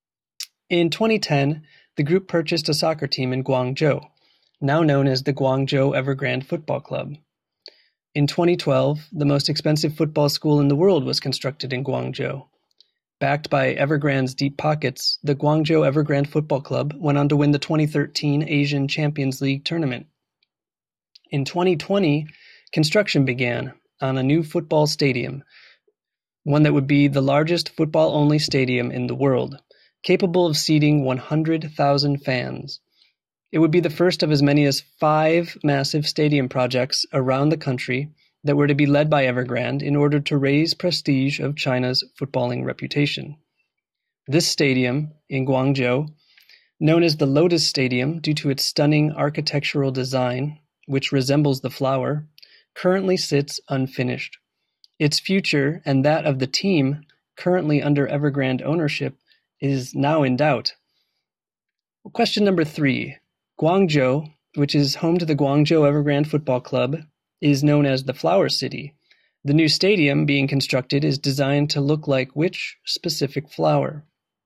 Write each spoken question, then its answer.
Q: The new stadium being constructed is designed to look like which specific flower?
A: The Guangzhou Evergrande Football Stadium is designed to look like a lotus flower, hence its nickname, the Lotus Stadium.